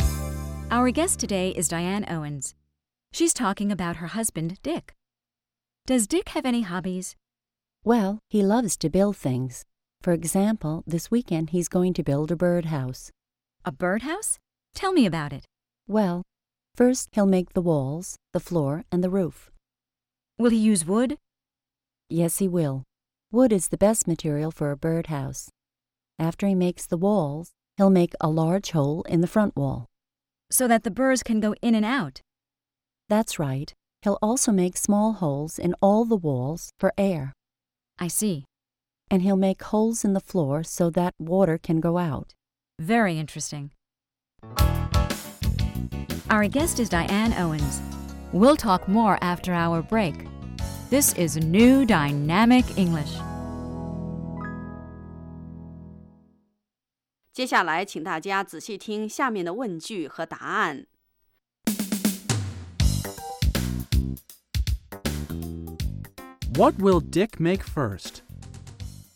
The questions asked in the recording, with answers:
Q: What will Dick make first?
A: First, he'll make the walls, the floor, and the roof.